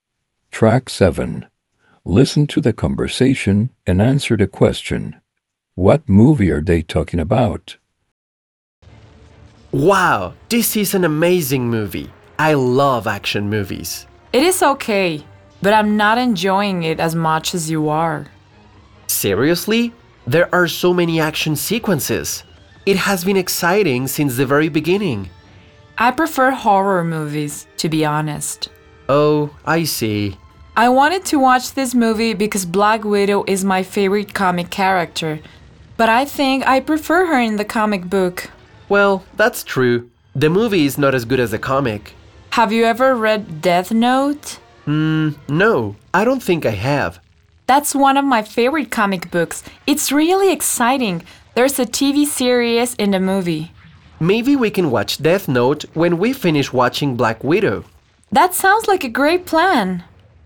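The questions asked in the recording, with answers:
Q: What movie are they talking about?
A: Black Widow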